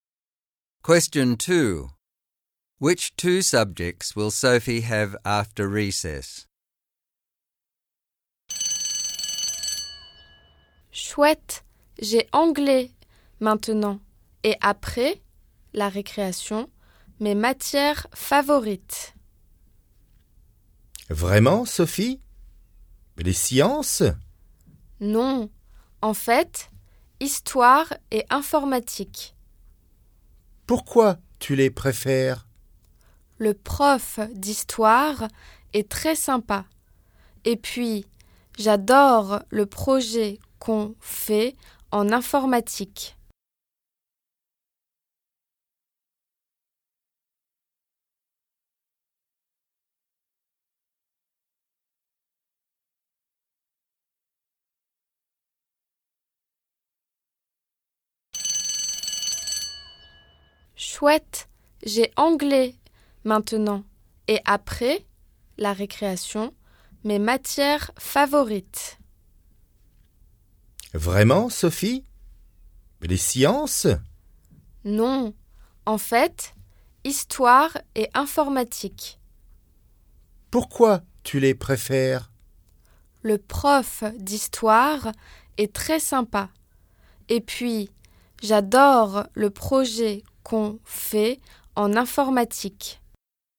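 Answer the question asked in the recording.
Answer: History and computing (IT)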